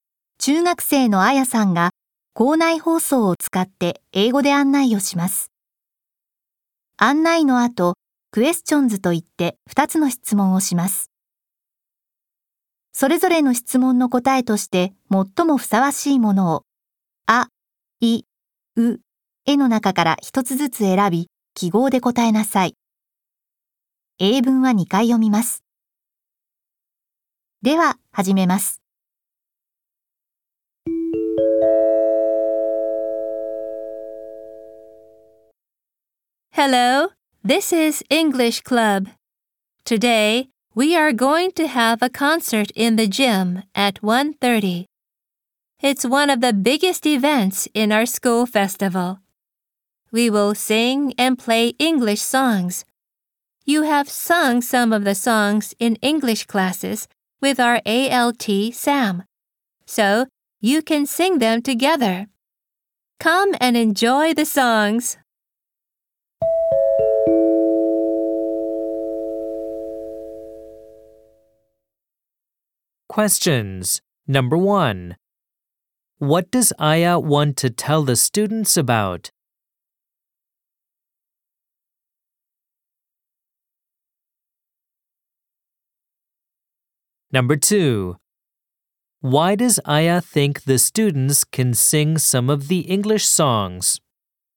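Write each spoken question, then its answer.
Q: What does Aya want to tell the students about?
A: A concert in the gym at 1:30 (English Club concert)

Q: Why does Aya think the students can sing some of the English songs?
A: Because they have sung some of the songs in English classes with their ALT, Sam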